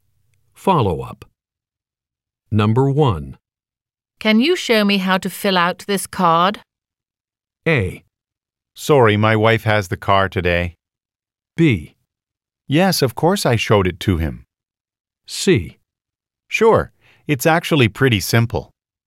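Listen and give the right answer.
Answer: C: Sure, it's actually pretty simple.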